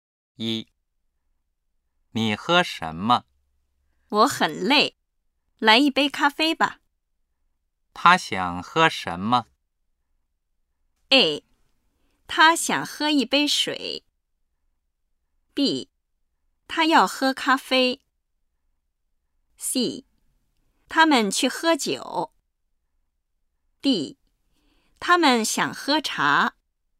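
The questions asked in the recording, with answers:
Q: 他想喝什么?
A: B: 他要喝咖啡。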